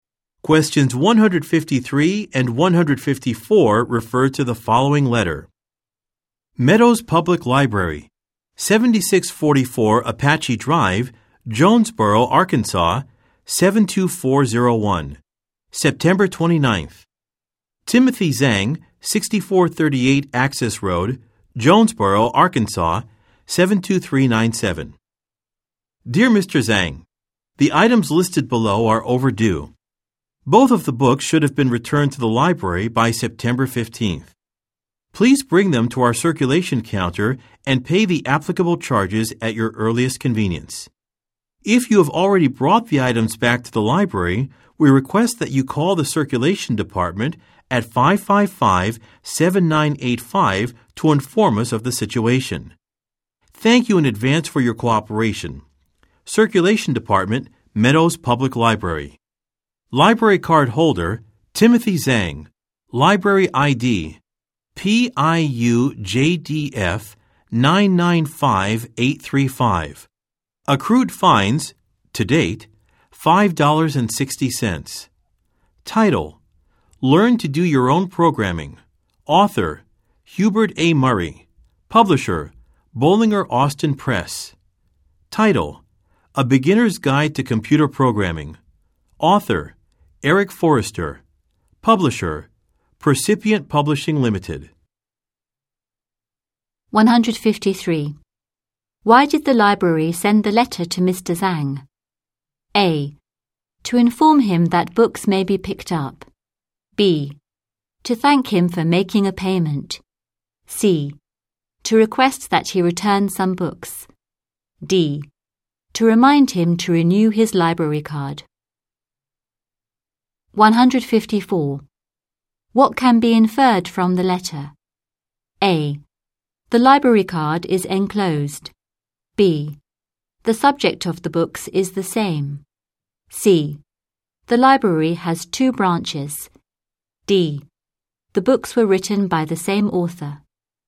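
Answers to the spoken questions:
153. C: To request that he return some books.
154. B: The subject of the books is the same.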